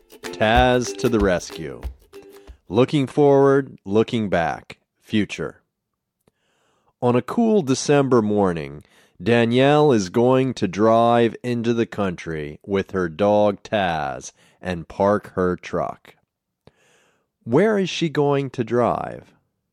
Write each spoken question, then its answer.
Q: Where is she going to drive?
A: She is going to drive into the country.